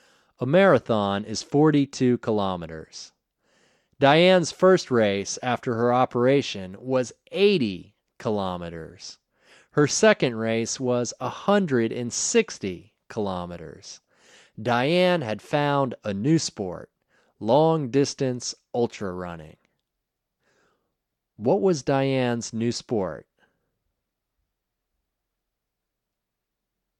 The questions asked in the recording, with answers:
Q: What was Diane's new sport?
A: Diane's new sport was long-distance ultra running.